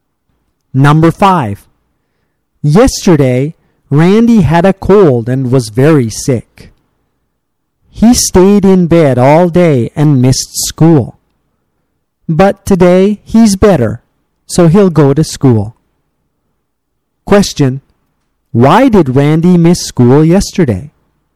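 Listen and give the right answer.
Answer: He had a cold and was very sick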